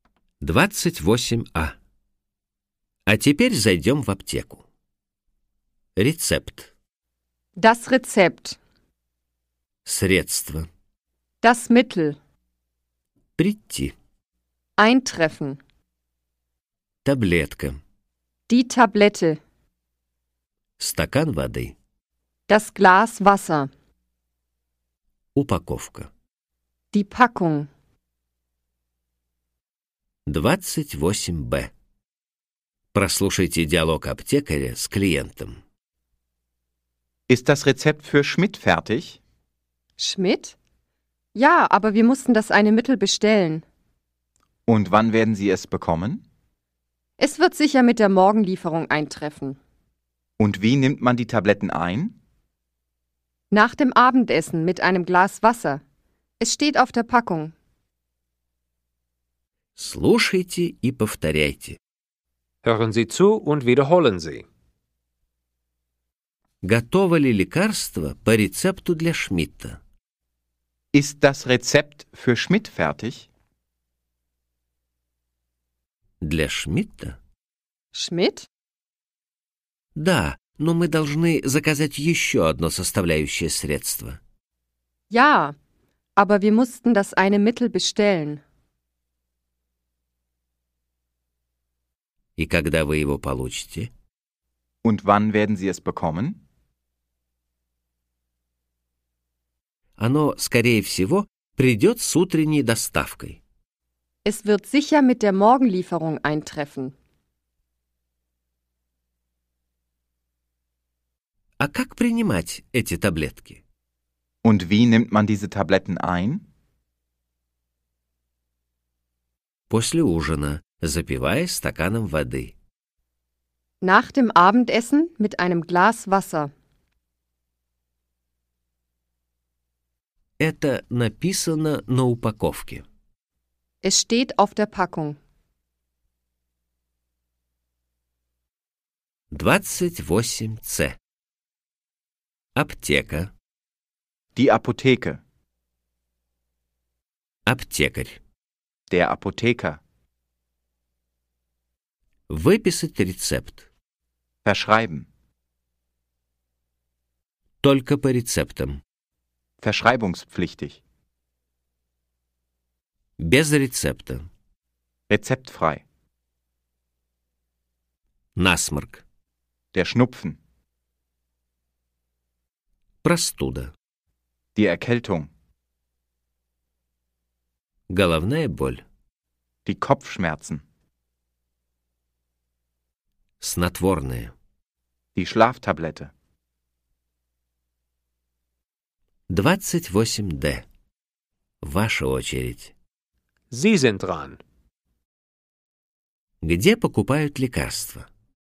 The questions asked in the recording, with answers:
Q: Где покупают лекарства?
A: В аптеке.